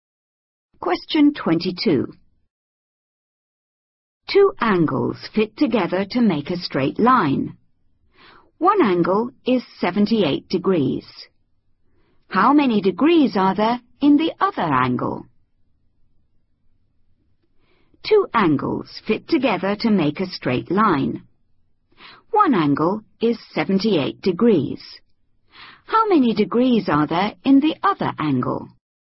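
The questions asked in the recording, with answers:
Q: How many degrees are there in the other angle?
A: 102 degrees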